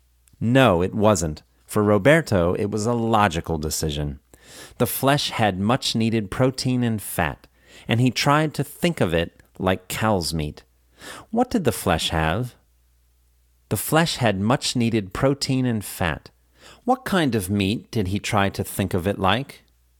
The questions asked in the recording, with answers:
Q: What kind of meat did he try to think of it like?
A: He tried to think of it like cow's meat.